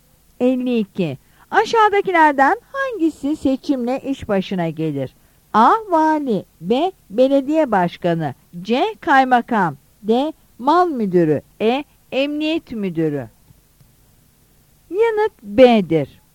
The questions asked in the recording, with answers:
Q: Aşağıdakilerden hangisi seçimle iş başına gelir?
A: Yanıt B'dir.